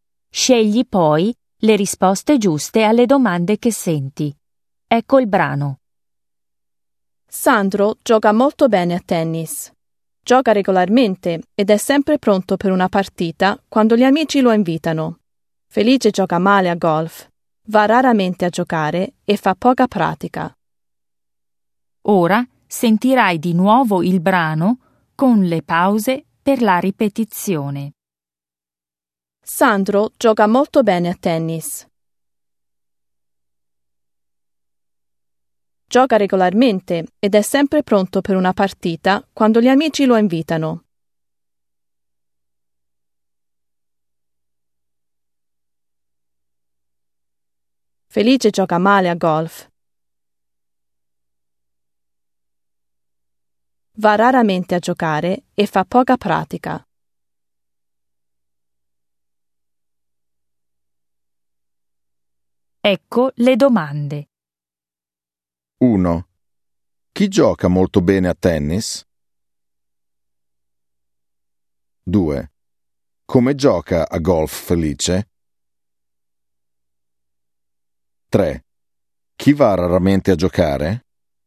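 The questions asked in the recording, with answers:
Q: Chi gioca molto bene a tennis?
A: Sandro

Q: Come gioca a golf Felice?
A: male

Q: Chi va raramente a giocare?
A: Felice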